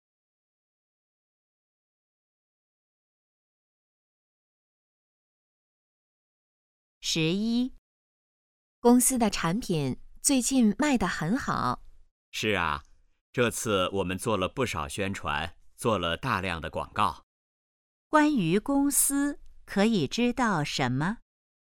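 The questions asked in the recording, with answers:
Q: 关于公司,可以知道什么?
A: 做了大量的广告,产品卖得很好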